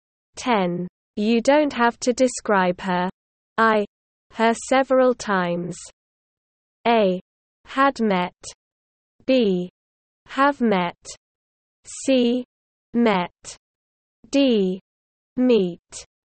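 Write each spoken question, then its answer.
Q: You don't have to describe her. I. Her several times.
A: B: Have met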